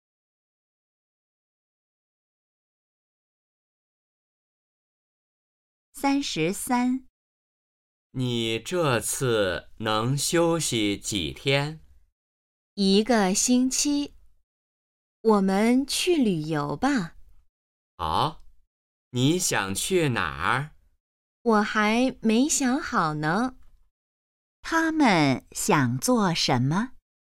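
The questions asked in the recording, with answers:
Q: 他们想做什么?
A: 去旅游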